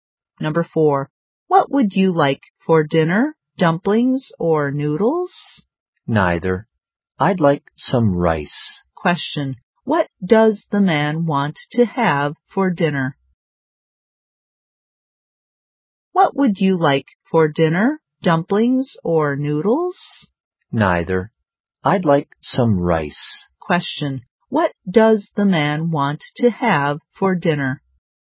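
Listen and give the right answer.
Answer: Rice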